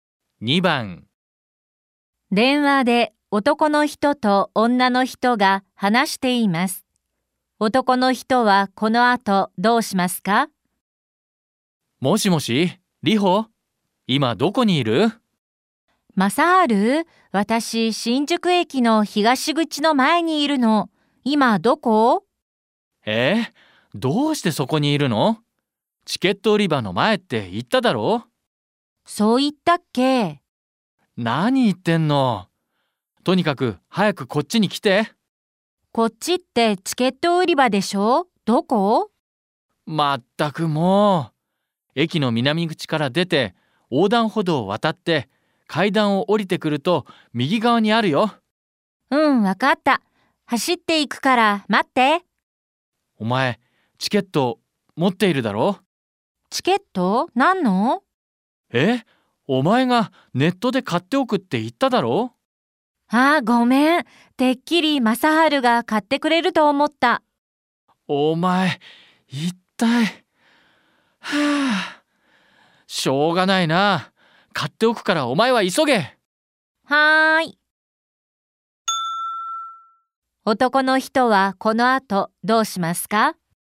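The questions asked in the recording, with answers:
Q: 男の人はこの後どうしますか?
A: チケットを買っておく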